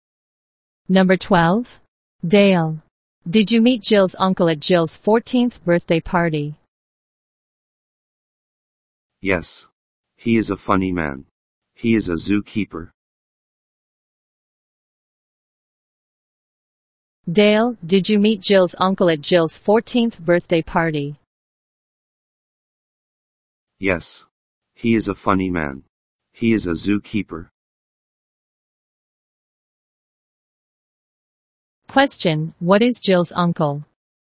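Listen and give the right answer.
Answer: A zookeeper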